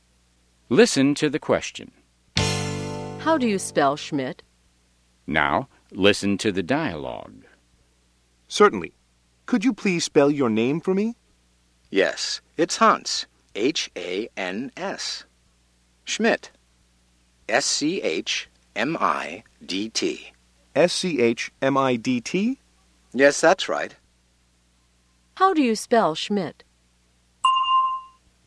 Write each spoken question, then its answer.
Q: How do you spell Schmidt?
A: S-C-H-M-I-D-T.